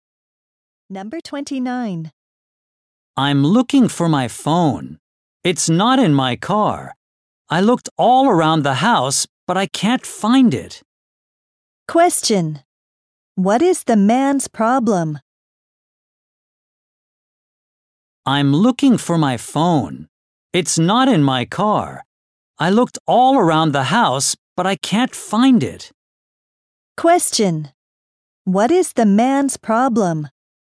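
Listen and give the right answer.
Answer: He can't find his phone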